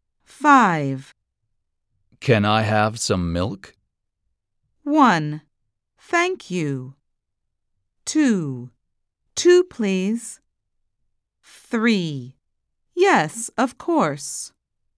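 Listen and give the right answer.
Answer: 3: Yes, of course.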